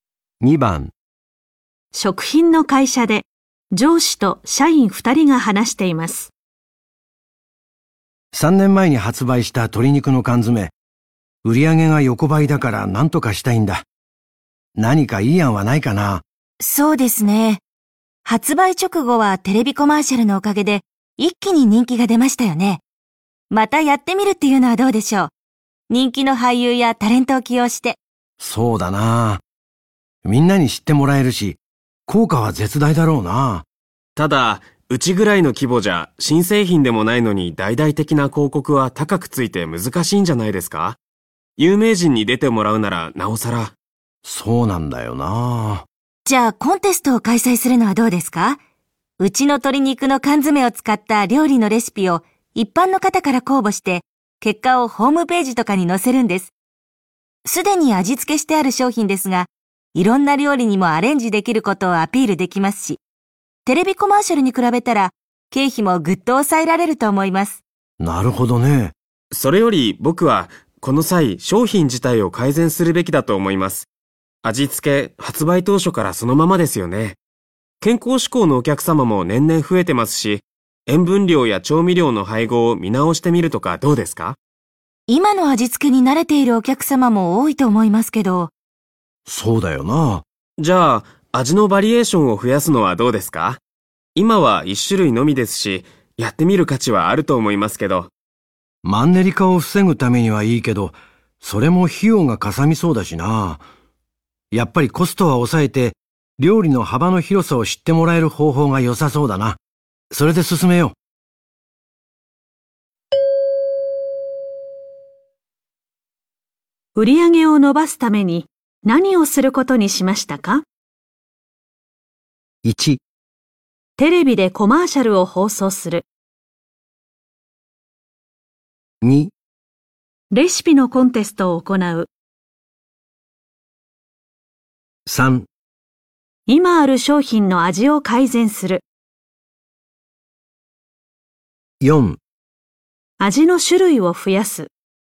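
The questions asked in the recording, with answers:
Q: げを伸ばすために何をすることにしましたか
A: 2: レシピのコンテストを行う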